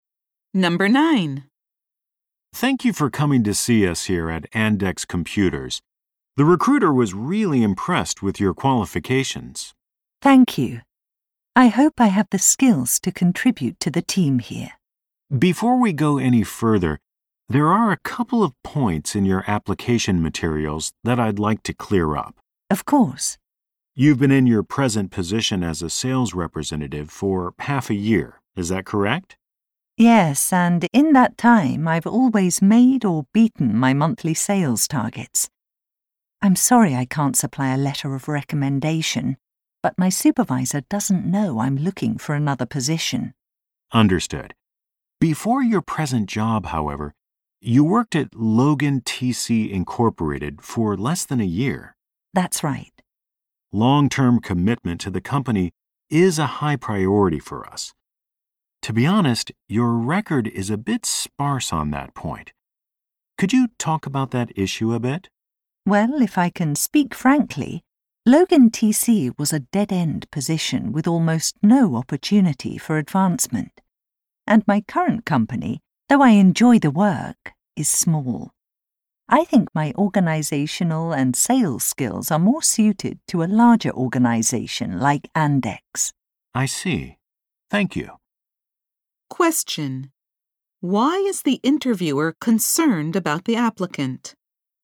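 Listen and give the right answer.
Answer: The applicant has not stayed long at previous jobs, raising doubts about long-term commitment.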